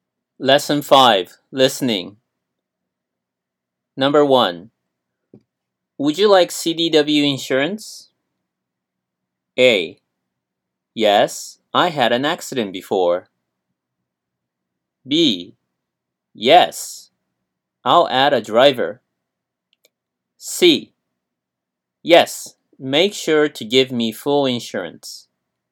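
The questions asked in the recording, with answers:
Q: Would you like CDW insurance?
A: C: Yes, make sure to give me full insurance.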